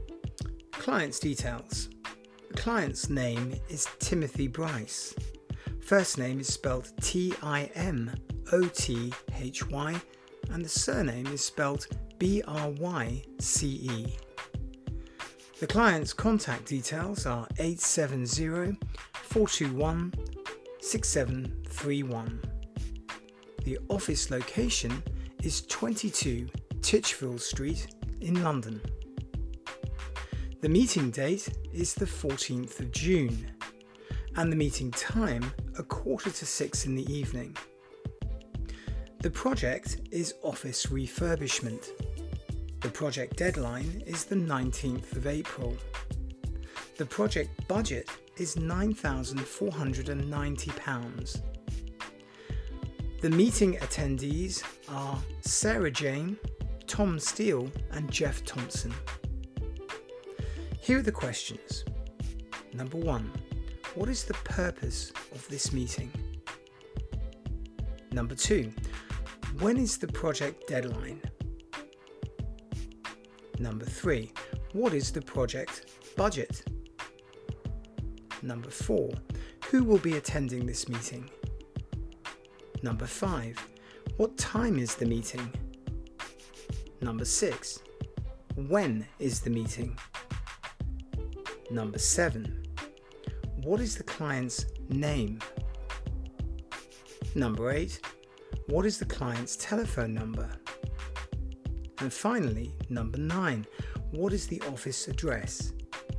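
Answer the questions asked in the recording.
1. office refurbishment project
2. 19th of April
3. £9,490
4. Sarah Jane, Tom Steele and Jeff Thompson
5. 5:45 in the evening
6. 14th of June
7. Timothy Bryce
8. 870-421-6731
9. 22 Titchfield Street, London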